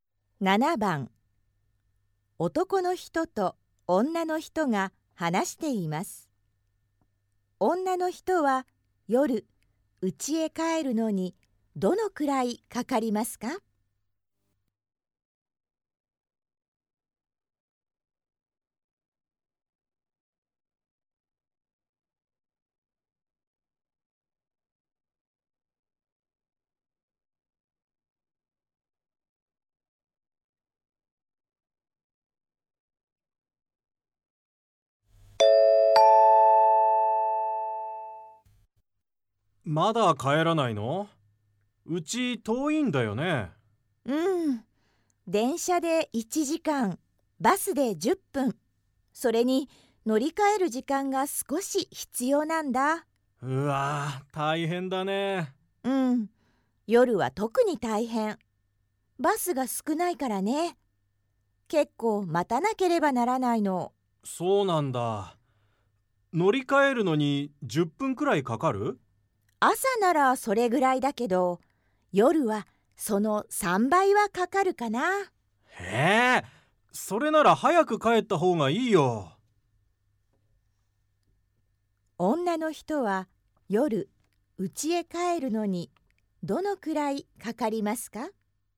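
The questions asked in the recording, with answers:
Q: 女の人は夜、家へ帰るのにどのくらいかかりますか?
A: 1時間40分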